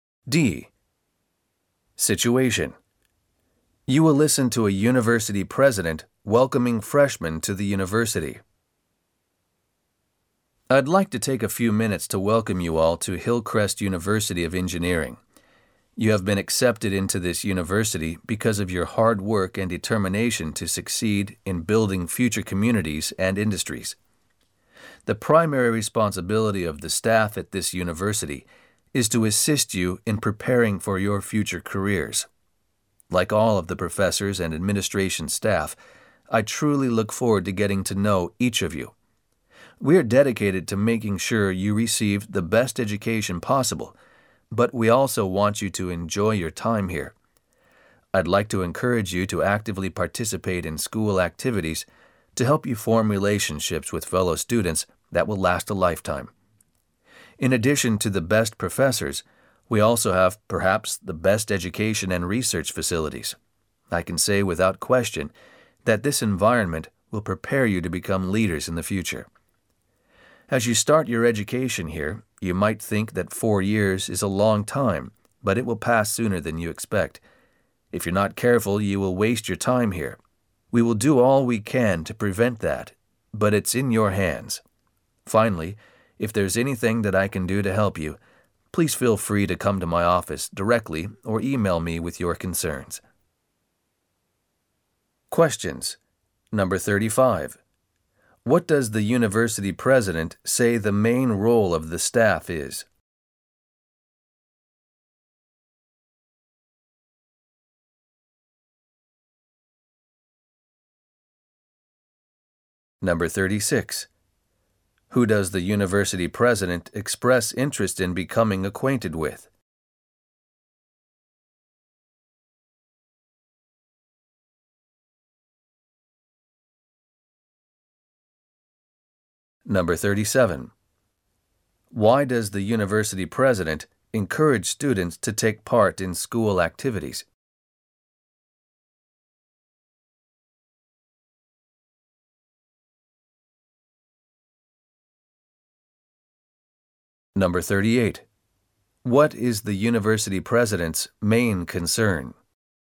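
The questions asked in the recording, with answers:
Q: What does the university president say the main role of the staff is?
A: To help students prepare for their future careers

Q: Who does the university president express interest in becoming acquainted with?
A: The new students (freshmen)

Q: Why does the university president encourage students to take part in school activities?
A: To form lifelong relationships with fellow students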